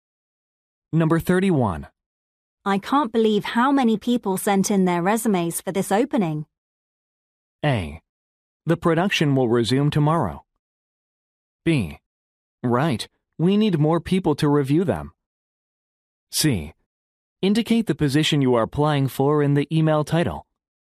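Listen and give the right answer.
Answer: B: Right, we need more people to review them.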